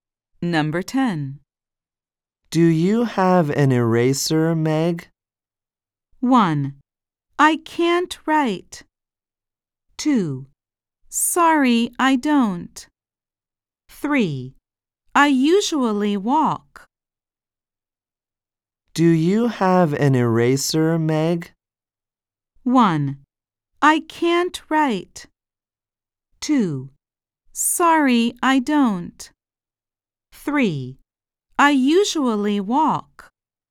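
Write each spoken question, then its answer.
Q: Do you have an eraser, Meg?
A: 2: Sorry, I don't.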